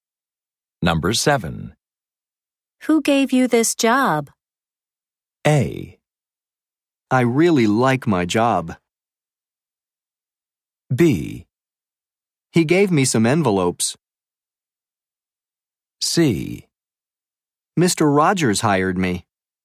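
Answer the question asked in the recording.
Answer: C: Mr. Rogers hired me.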